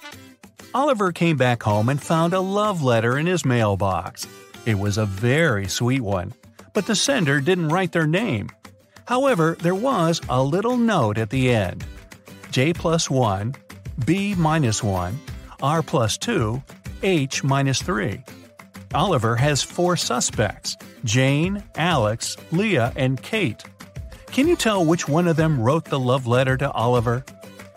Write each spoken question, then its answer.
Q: Can you tell which one of them wrote the love letter to Oliver?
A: So, the secret admirer is Kate.